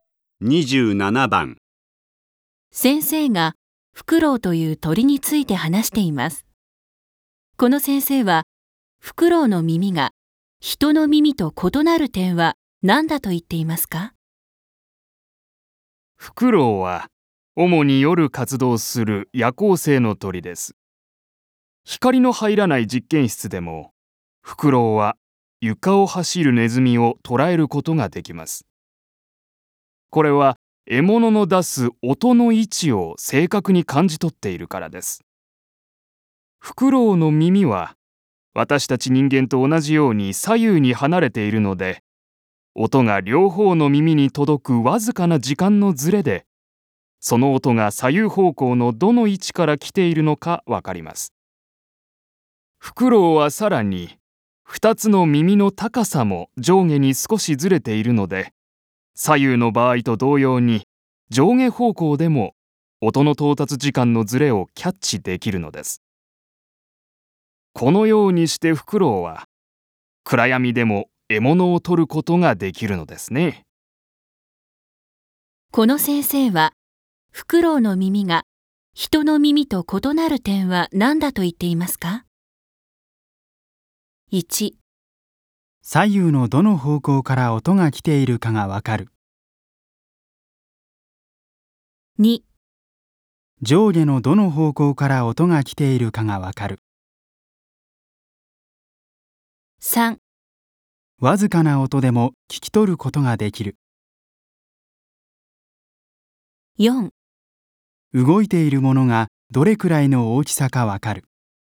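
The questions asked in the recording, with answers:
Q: この先生はフクロウの耳が人の耳と異なる点は何だと言っていますか?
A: 2: 上下のどの方向から音が来ているかがわかる。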